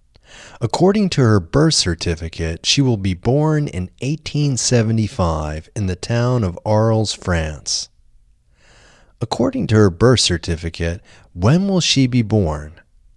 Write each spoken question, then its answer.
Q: According to her birth certificate, when will she be born?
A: According to her birth certificate, she will be born in 1875.